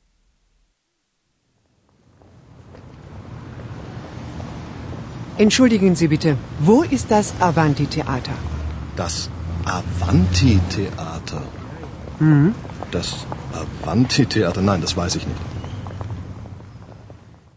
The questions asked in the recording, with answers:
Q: Что ищет женщина?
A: Вы поняли из услышанного, что женщина ищет театр.